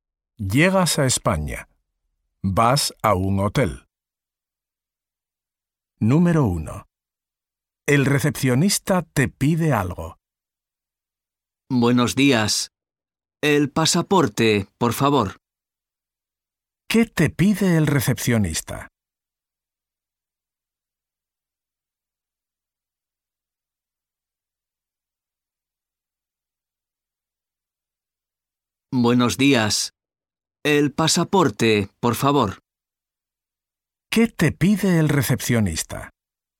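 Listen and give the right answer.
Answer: El pasaporte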